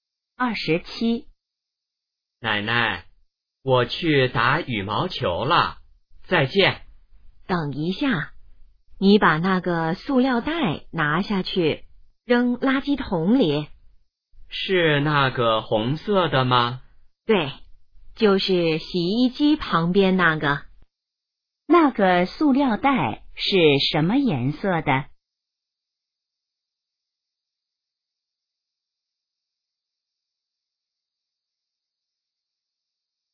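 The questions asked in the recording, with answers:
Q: 那个塑料袋是什么颜色的?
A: 红色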